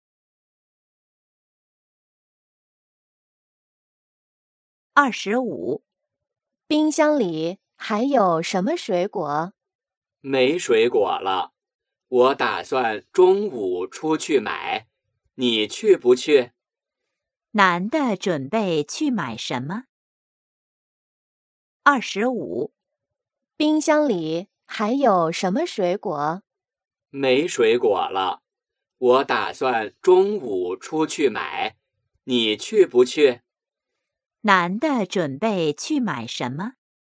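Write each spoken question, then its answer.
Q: 男的准备去买什么?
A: 水果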